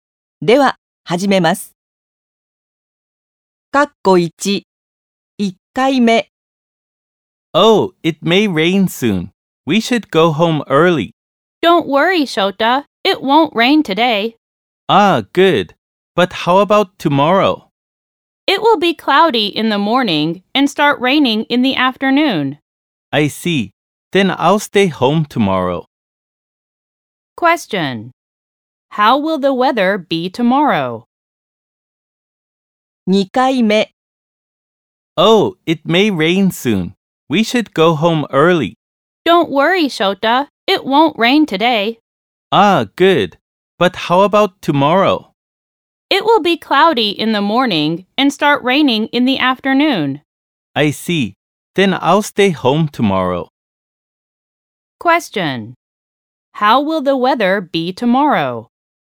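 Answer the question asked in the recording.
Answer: Cloudy in the morning, then rain in the afternoon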